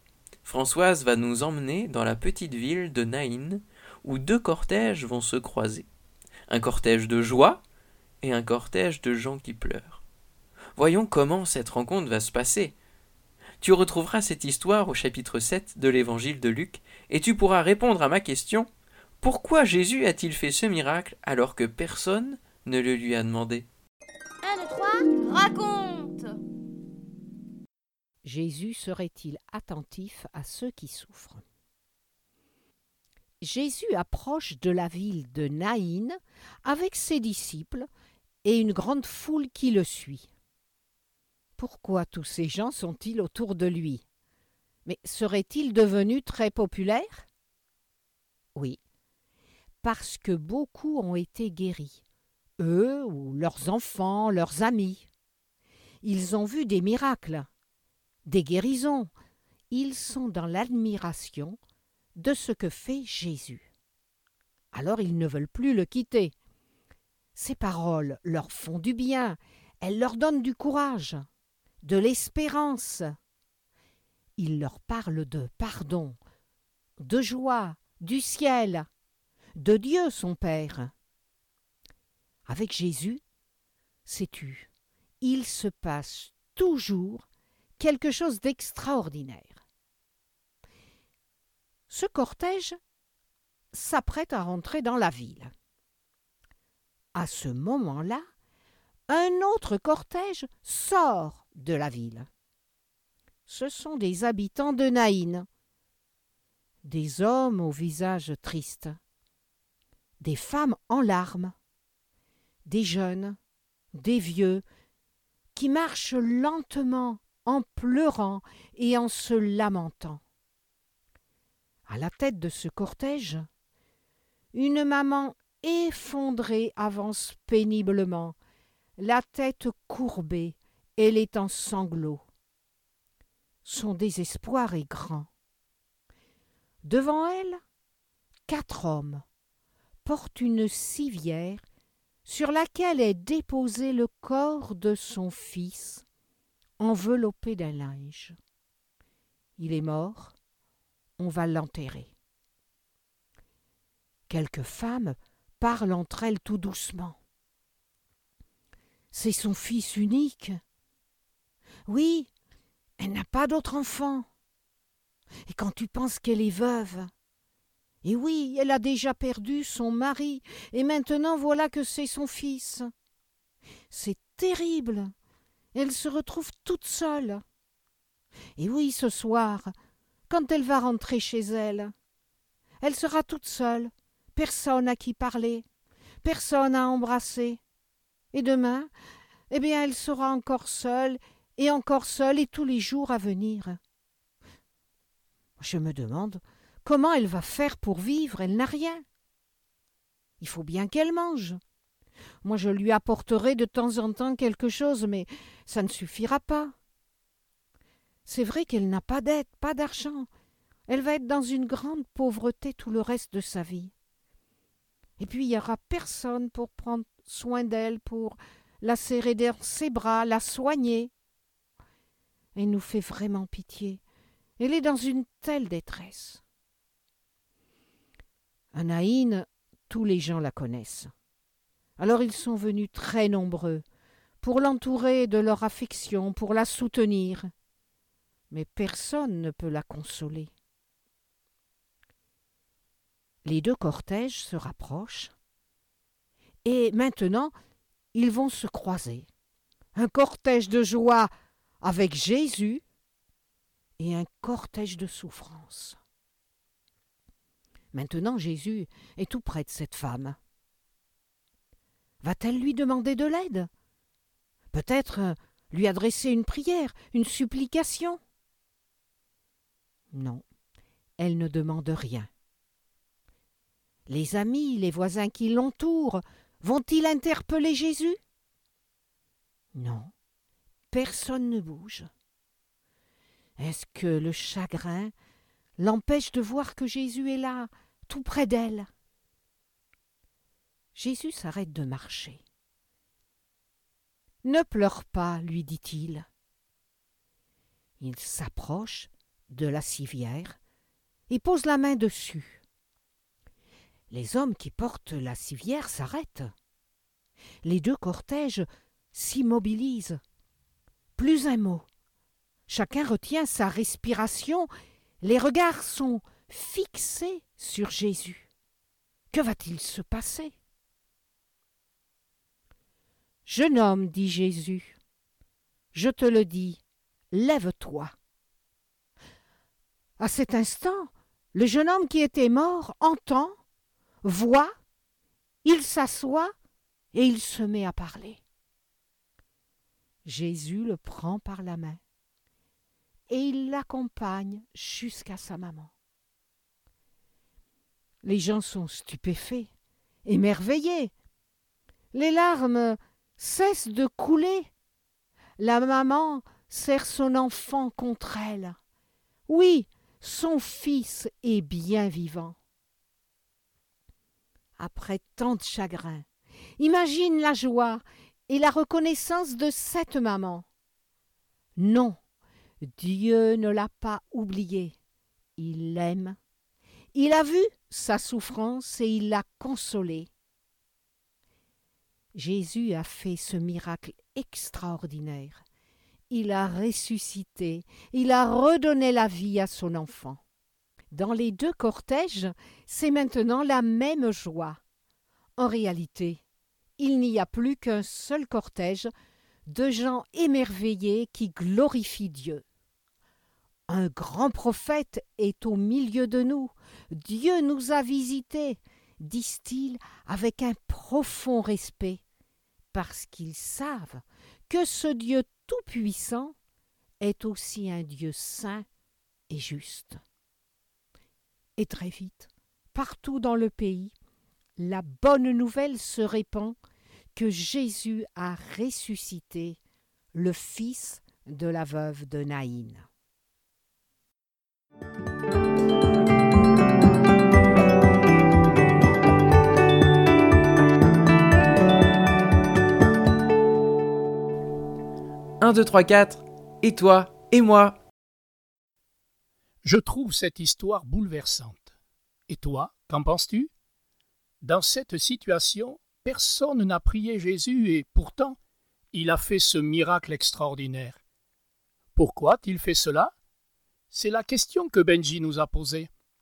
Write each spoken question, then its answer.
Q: Pourquoi Jésus a-t-il fait ce miracle alors que personne ne le lui a demandé ?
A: Jésus, ayant vu cette femme, a été ému de compassion pour elle.